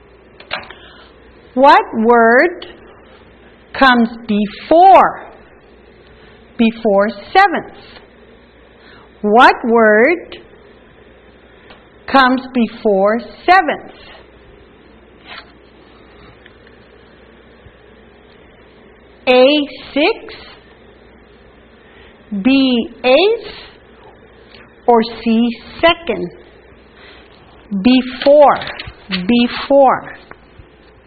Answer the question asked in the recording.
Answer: Before seventh is sixth.